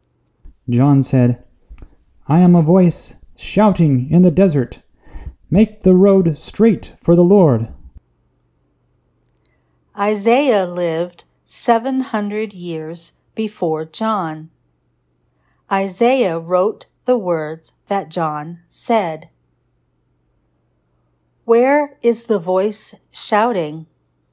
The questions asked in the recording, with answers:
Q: Where is the voice shouting?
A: The voice is shouting in the desert.